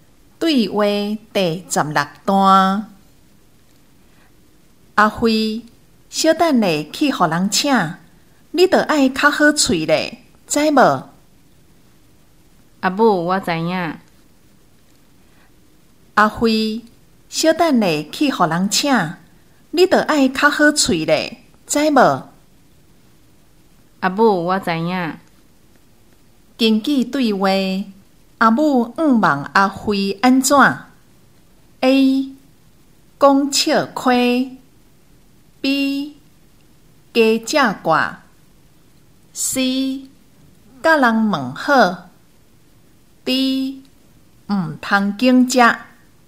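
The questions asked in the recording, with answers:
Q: 根据对话。阿母希望阿辉安怎 ?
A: C: 甲人问好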